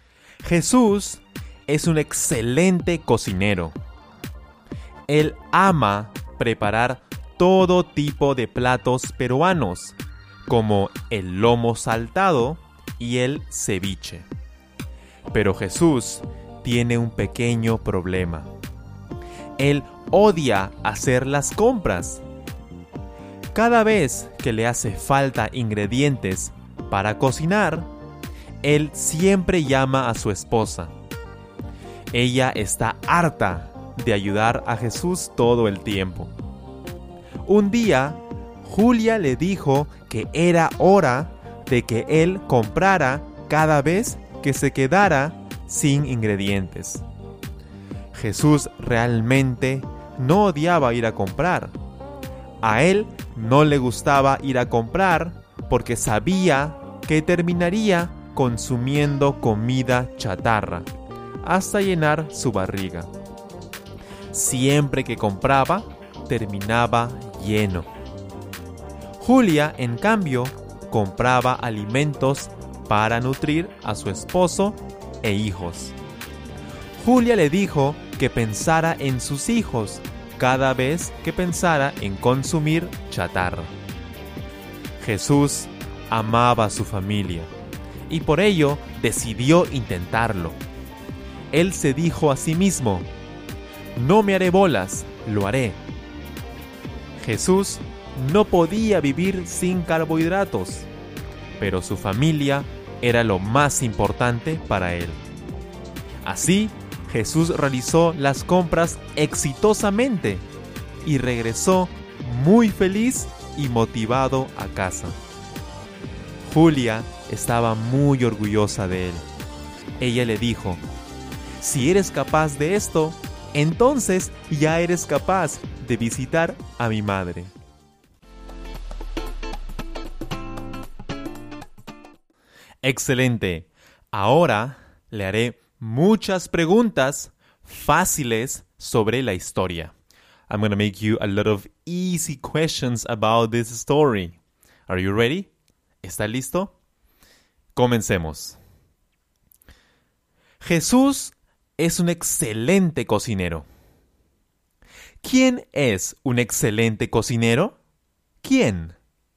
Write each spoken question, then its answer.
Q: ¿Quién es un excelente cocinero?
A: Jesús. Jesús es un excelente cocinero.